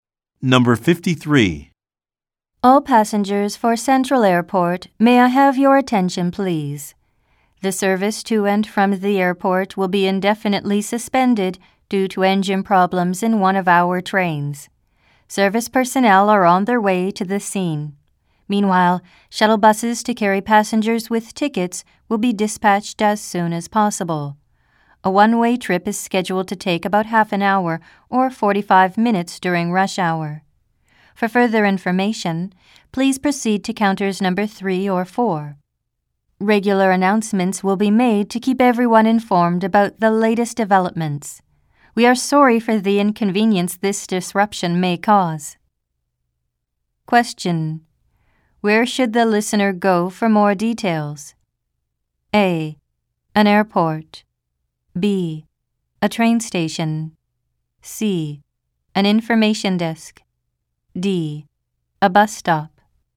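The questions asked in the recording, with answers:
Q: Where should the listener go for more details?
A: C: An information desk.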